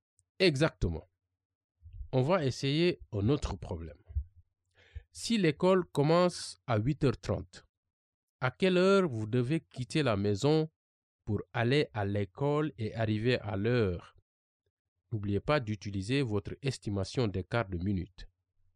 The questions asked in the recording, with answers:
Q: Si l'école commence à 8h30, à quelle heure vous devez quitter la maison pour aller à l'école et arriver à l'heure?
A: Je pense que je dois partir à 8h.